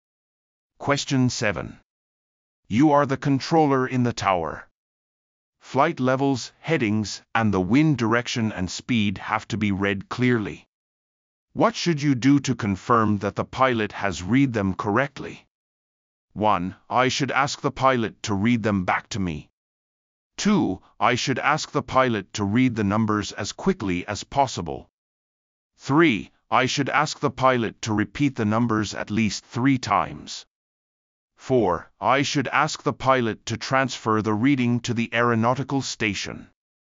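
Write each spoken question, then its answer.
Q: What should you do to confirm that the pilot has read them correctly?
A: 1: I should ask the pilot to read them back to me.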